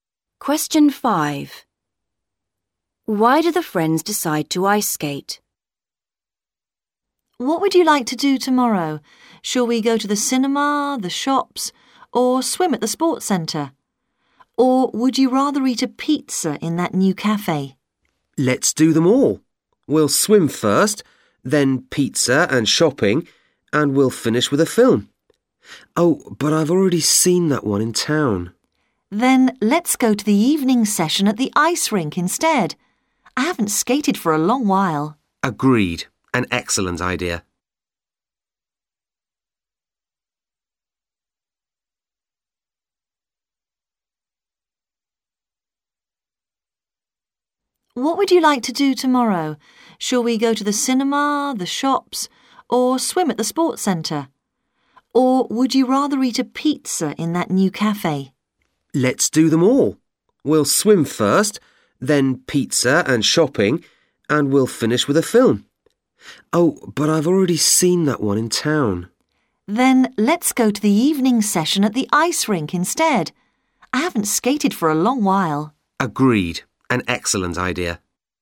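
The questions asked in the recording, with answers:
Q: Why do the friends decide to ice skate?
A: One of them has already seen the film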